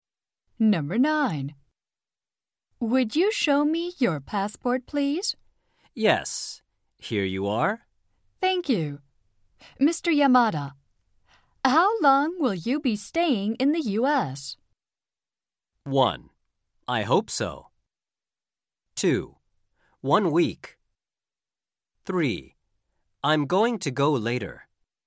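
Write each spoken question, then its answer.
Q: Mr. Yamada, how long will you be staying in the U.S.?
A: 2: 1 week.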